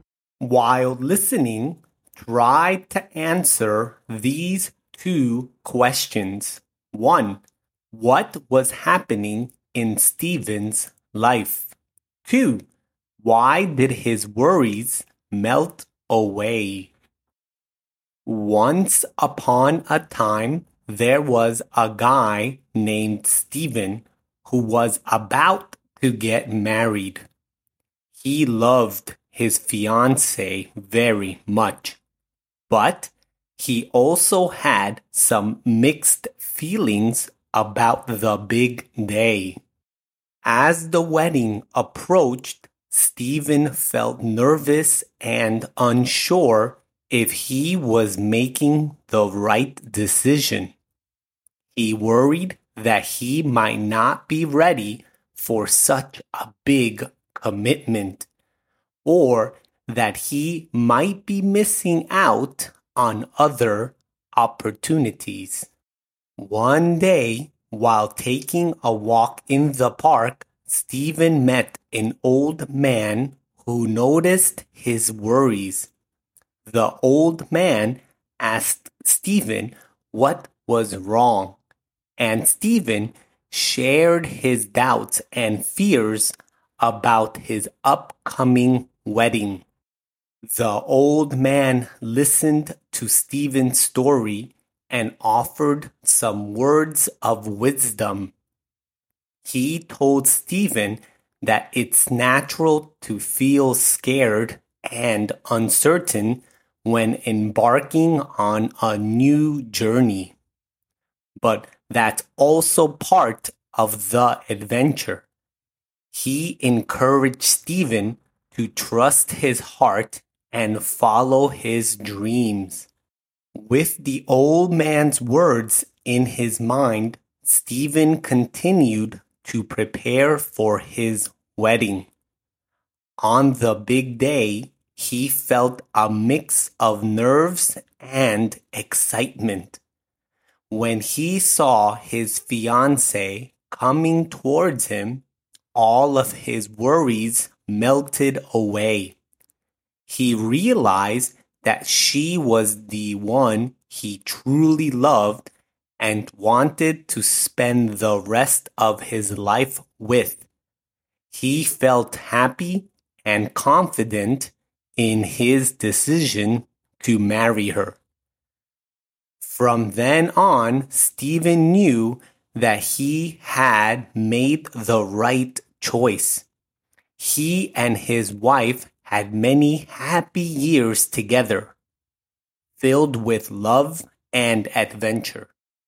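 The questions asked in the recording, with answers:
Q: what was happening in Stephen's life?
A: He was about to get married.

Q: why did his worries melt away?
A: When he saw his fiancée coming towards him, he realized she was the one he truly loved.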